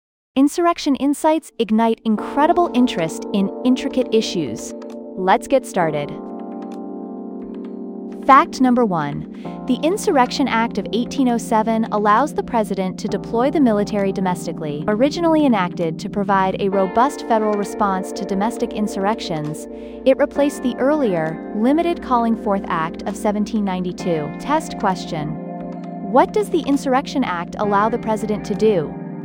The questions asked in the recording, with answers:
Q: What does the Insurrection Act allow the president to do?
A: Deploy the military domestically.